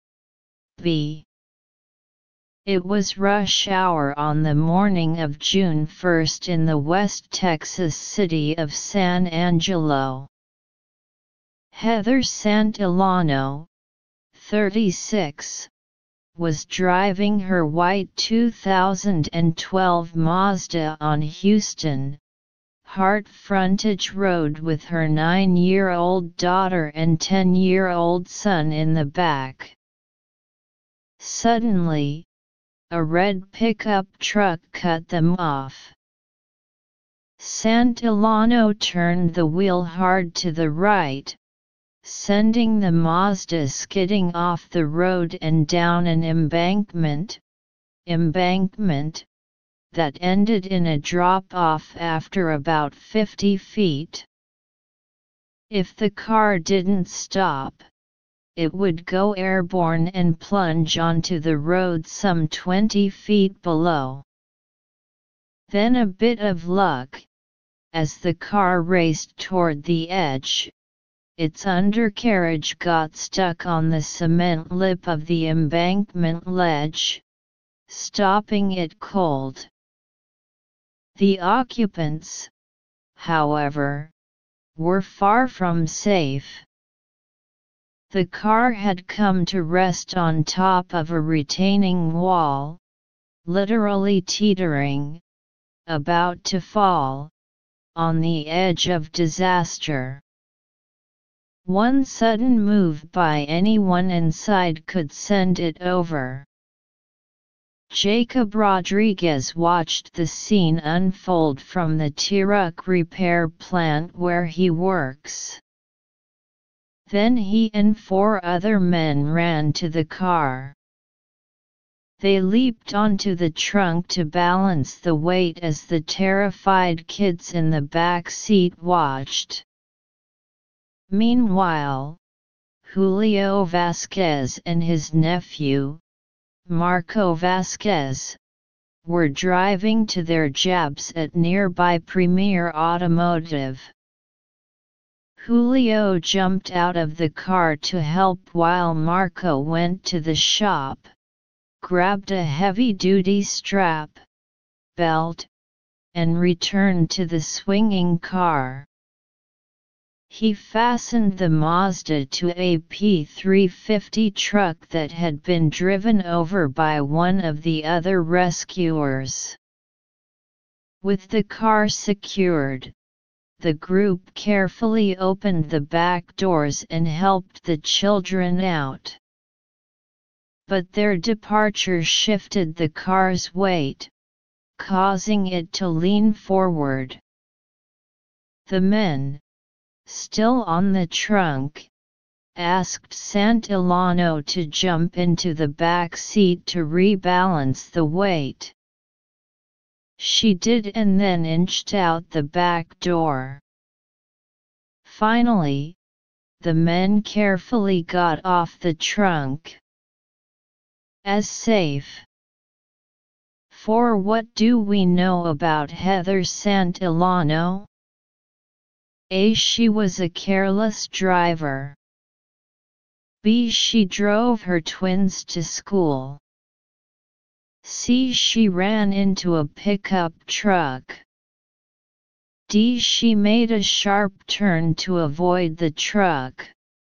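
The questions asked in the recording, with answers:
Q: For what do we know about Heather Santillano?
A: D: She made a sharp turn to avoid the truck.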